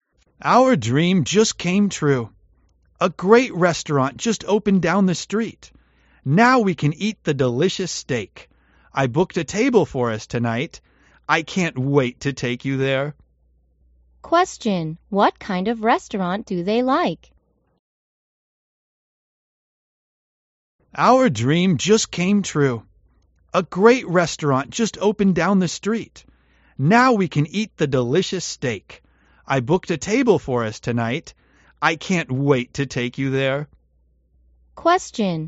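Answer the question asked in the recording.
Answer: A steak restaurant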